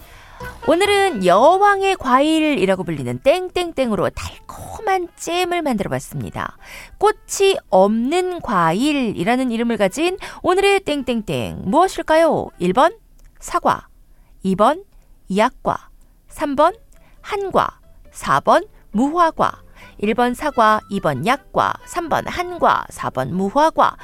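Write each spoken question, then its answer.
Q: 꽃이 없는 과일이라는 이름을 가진 오늘의 땡땡땡 무엇일까요?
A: 4: 무화과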